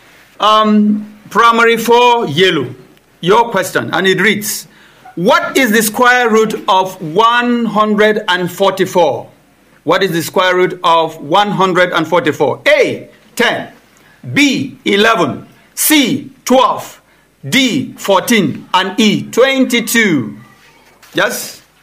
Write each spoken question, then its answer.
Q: what is the square root of 144?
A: C, 12.